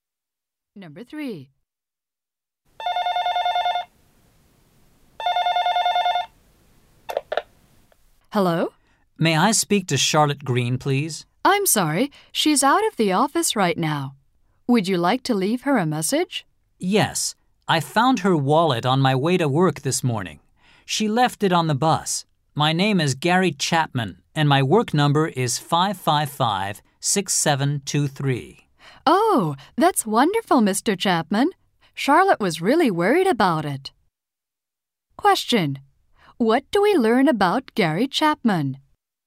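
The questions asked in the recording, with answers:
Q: What do we learn about Gary Chapman?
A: He found Charlotte's wallet on the bus.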